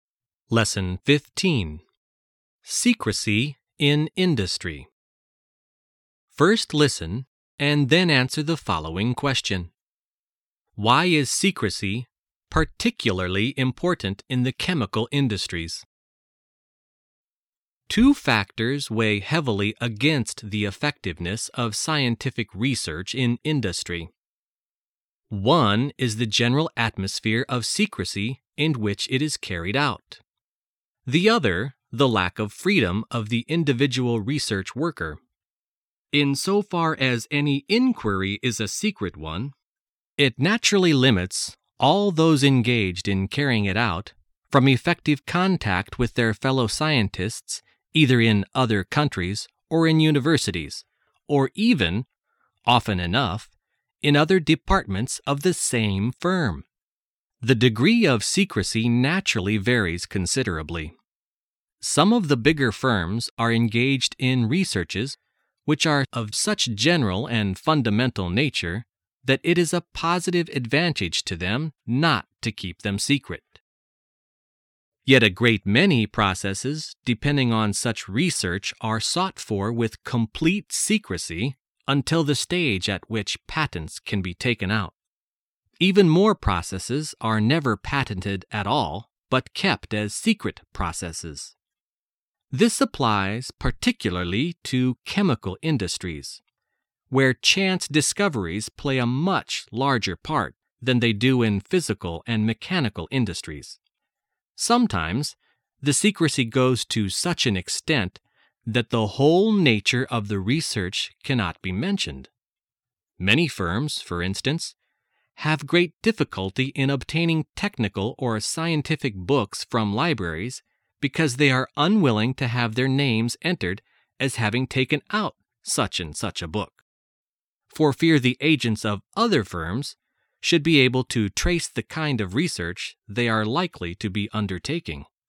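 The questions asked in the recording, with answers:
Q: Why is secrecy particularly important in the chemical industries?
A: Because chance discoveries play a much larger part there than in physical and mechanical industries.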